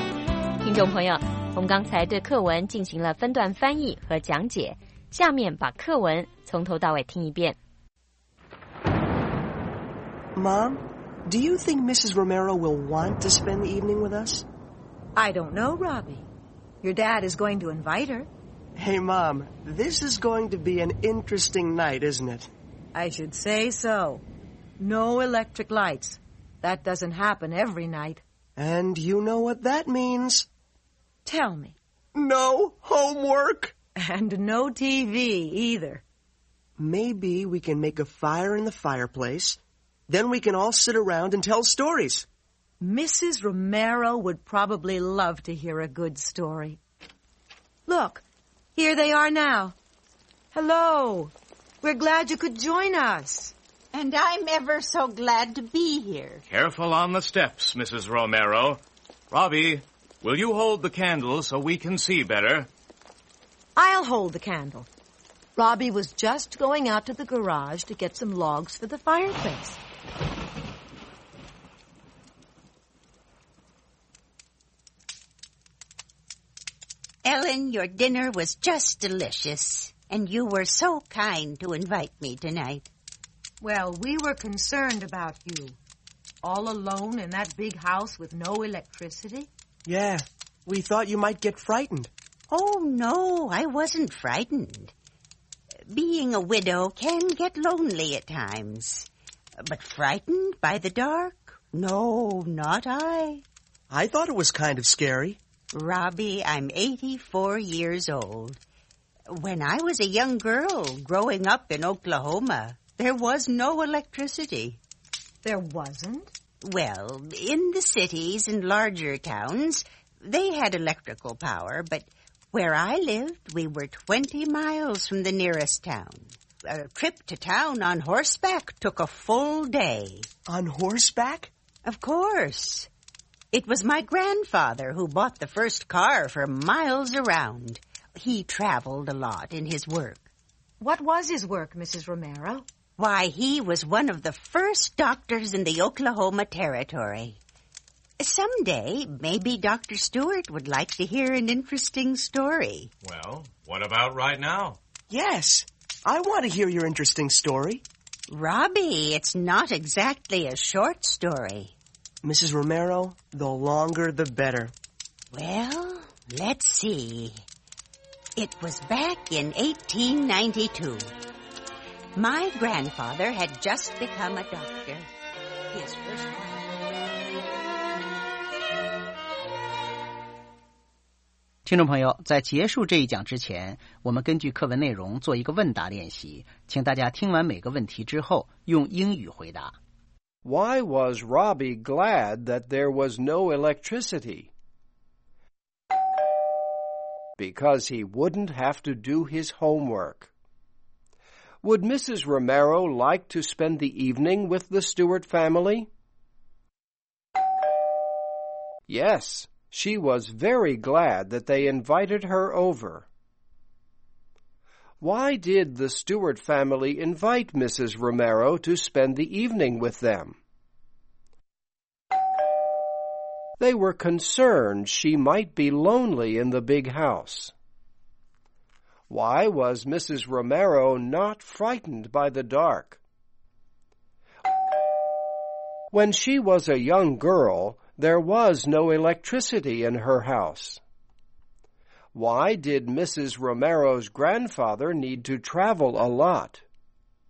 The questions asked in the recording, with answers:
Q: Why was Robbie glad that there was no electricity?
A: Because he wouldn't have to do his homework.

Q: Would Mrs. Romero like to spend the evening with the Stewart family?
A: Yes, she was very glad that they invited her over.

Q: Why did the Stewart family invite Mrs. Romero to spend the evening with them?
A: They were concerned she might be lonely in the big house.

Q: Why did Mrs. Romero's grandfather need to travel a lot?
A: Because he was a doctor in the Oklahoma Territory.